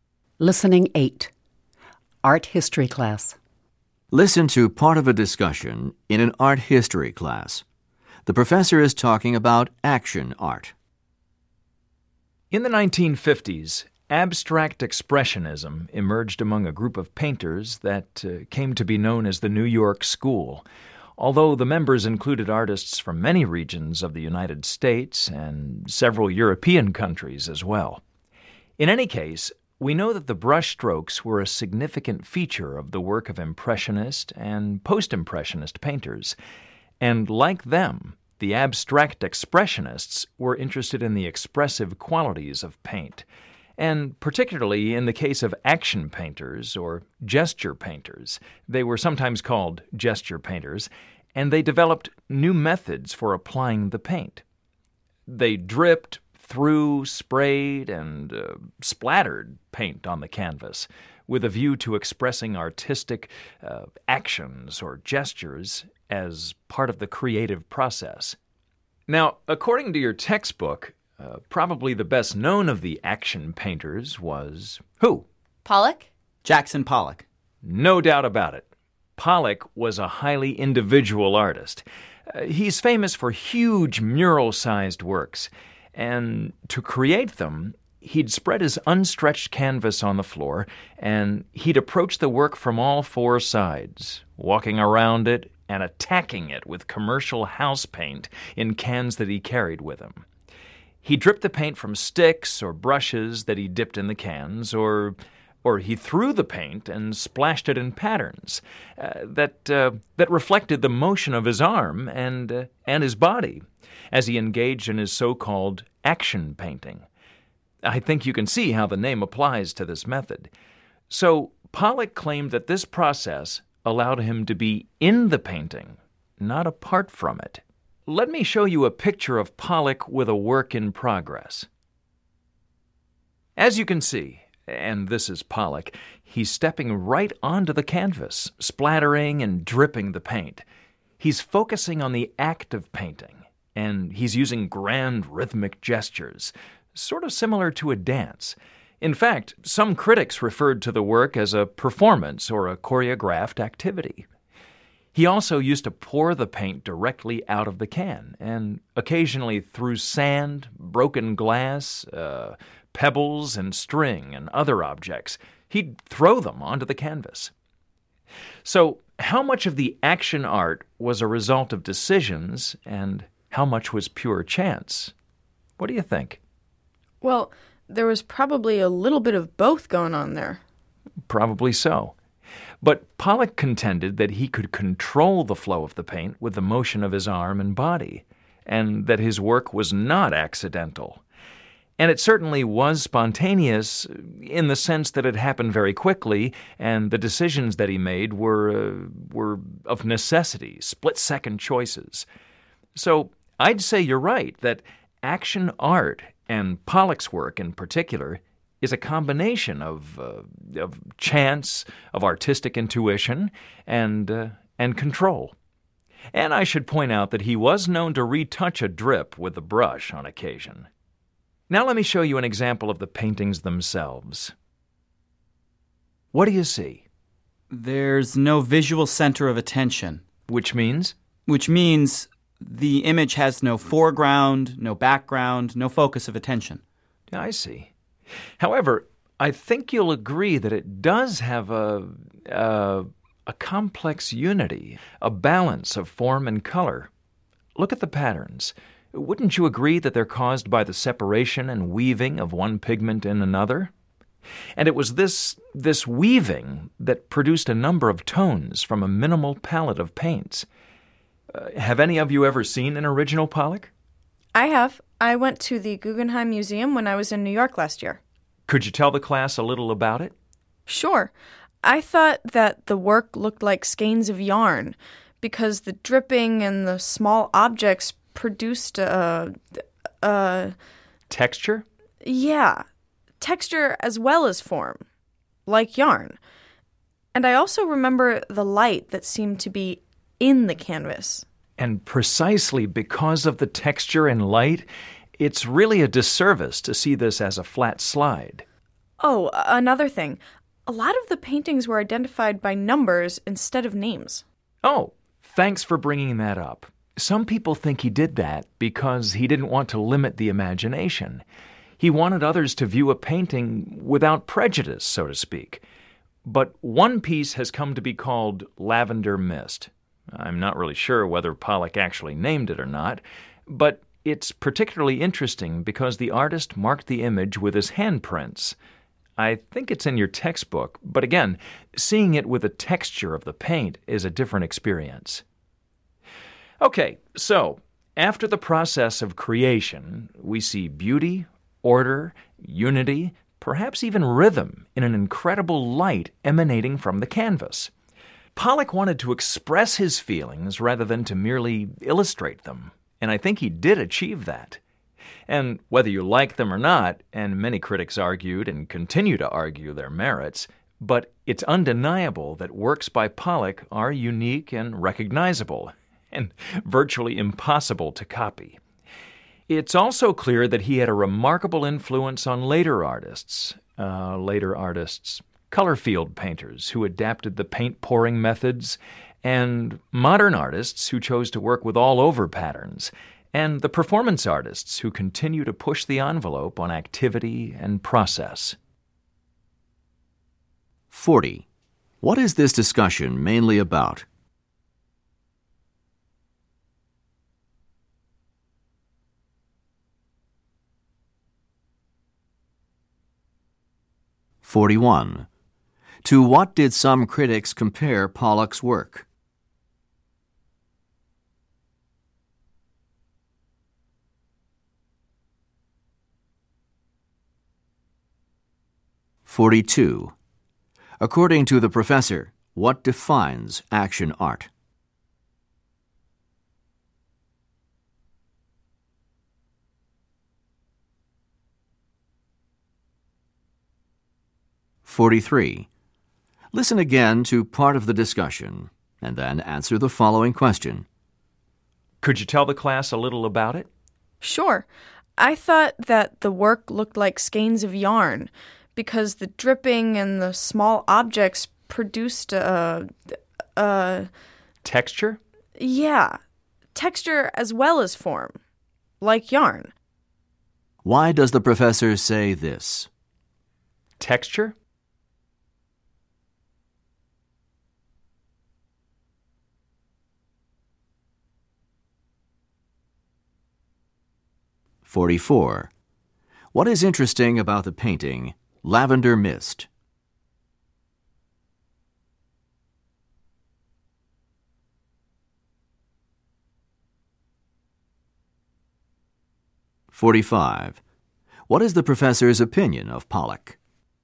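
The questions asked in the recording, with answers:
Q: What is this discussion mainly about?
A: Action art, especially Jackson Pollock's action painting

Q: To what did some critics compare Pollock's work?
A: A performance or a dance (a choreographed activity)

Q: According to the professor, what defines action art?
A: A combination of chance, artistic intuition, and control

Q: What is interesting about the painting, Lavender Mist?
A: The artist marked it with his handprints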